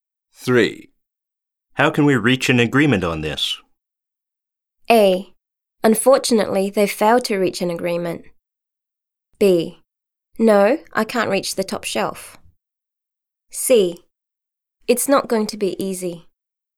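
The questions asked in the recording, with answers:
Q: How can we reach an agreement on this?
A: C: It's not going to be easy.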